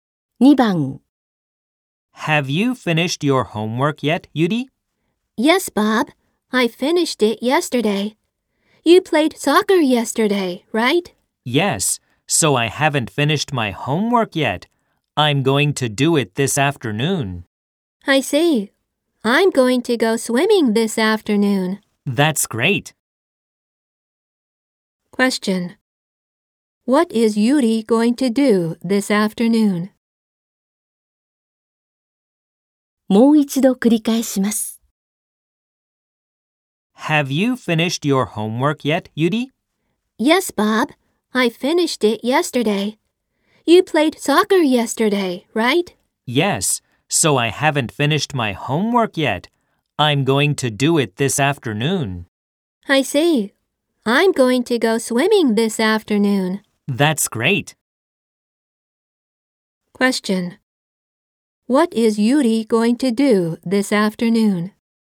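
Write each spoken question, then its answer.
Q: What is Yuri going to do this afternoon?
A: Do her homework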